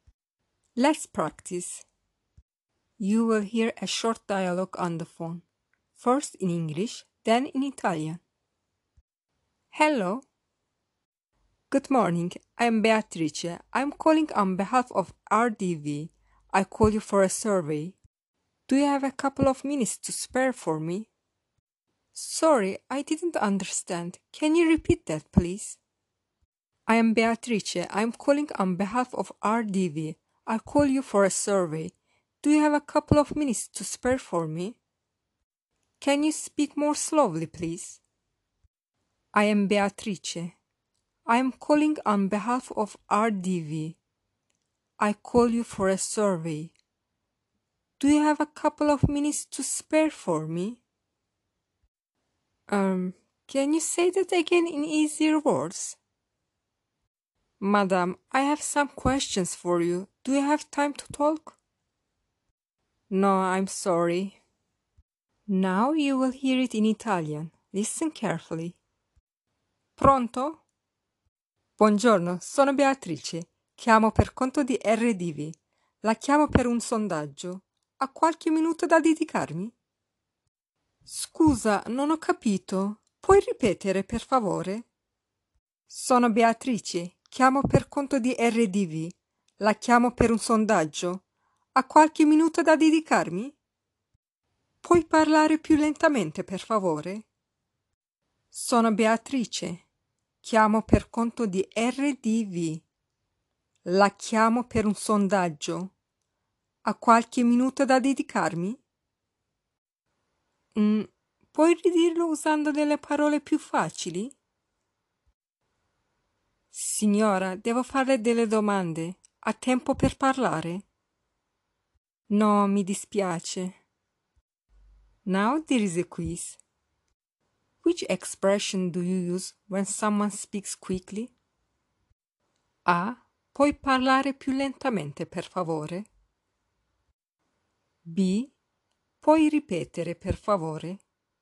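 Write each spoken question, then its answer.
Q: Which expression do you use when someone speaks quickly?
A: A: Puoi parlare più lentamente, per favore?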